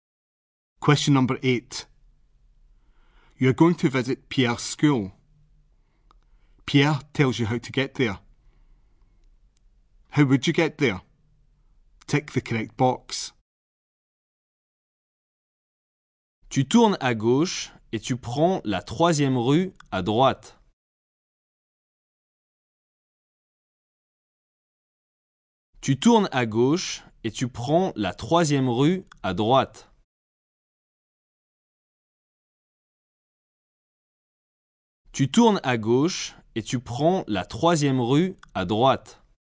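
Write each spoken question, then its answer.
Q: How would you get there?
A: Turn left, then take the third street on the right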